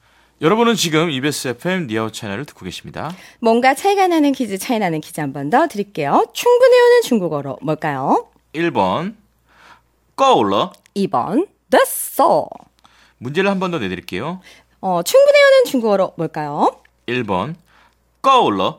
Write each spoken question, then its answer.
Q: 충분해 하는 중국어로 뭘까요?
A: 1번 고라.